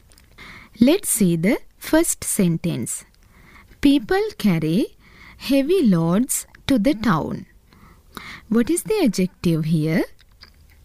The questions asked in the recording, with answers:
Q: What is the adjective here?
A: Yes, very good. Heavy is the adjective.